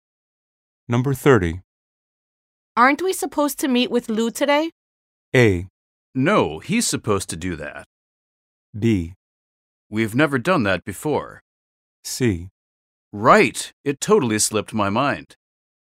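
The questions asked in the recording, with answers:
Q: Aren't we supposed to meet with Lou today?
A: C: Right, it totally slipped my mind.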